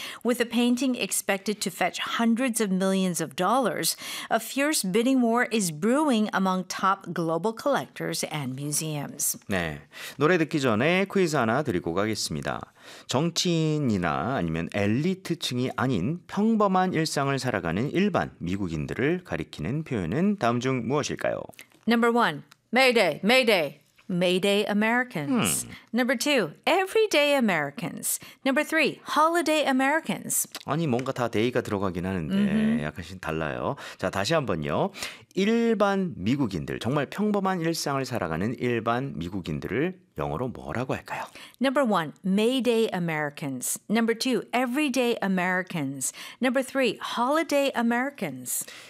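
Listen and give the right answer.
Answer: 2: Everyday Americans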